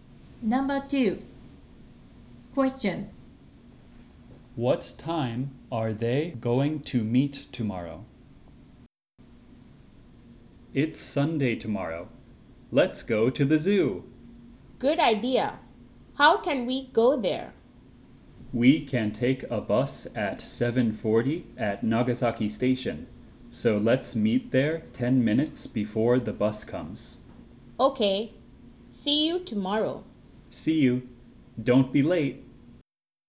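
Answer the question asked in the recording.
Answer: 7:30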